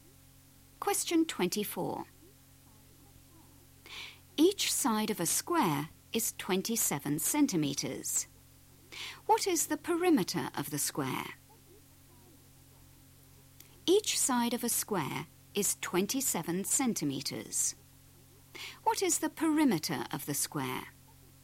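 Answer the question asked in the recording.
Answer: 108 cm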